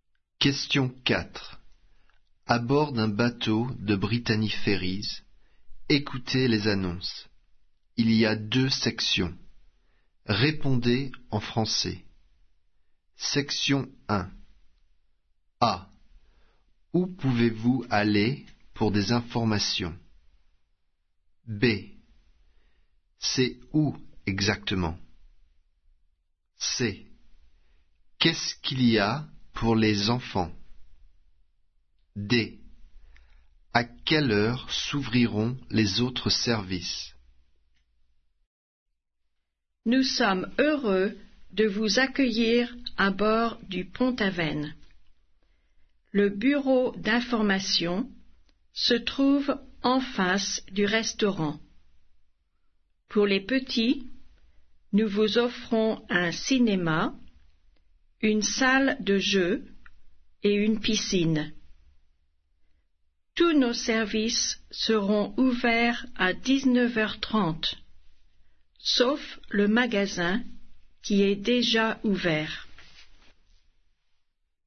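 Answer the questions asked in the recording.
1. Au bureau d'information
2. En face du restaurant
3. Un cinéma, une salle de jeu et une piscine
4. À 19h30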